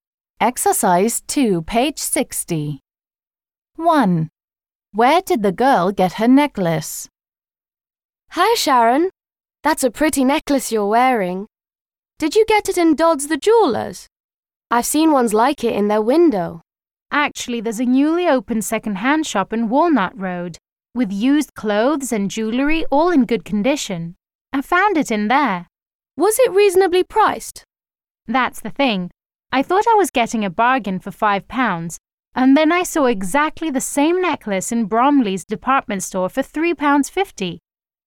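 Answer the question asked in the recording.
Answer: In a second-hand shop in Walnut Road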